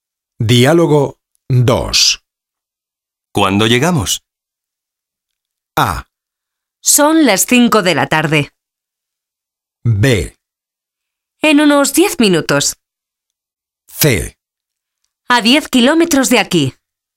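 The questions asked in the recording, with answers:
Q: ¿Cuándo llegamos?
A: B: En unos 10 minutos.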